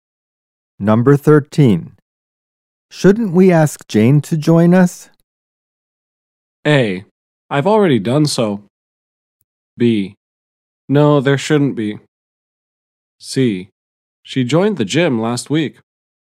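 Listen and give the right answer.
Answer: A: I've already done so.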